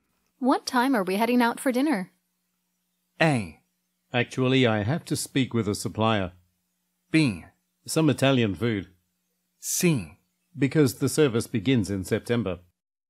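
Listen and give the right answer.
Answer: A: Actually, I have to speak with a supplier.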